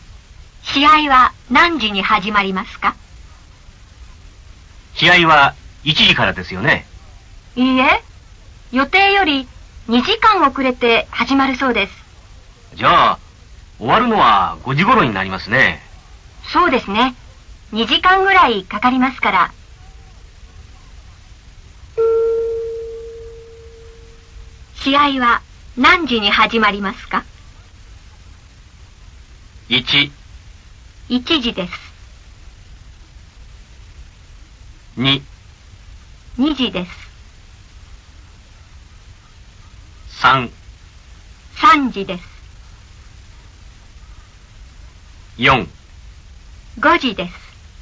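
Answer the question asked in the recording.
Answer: 3: 3時です。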